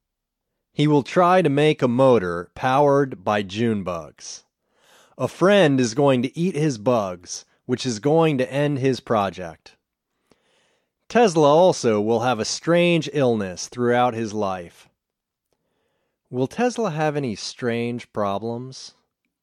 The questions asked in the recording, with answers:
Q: Will Tesla have any strange problems?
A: Yes. Tesla will have a strange illness.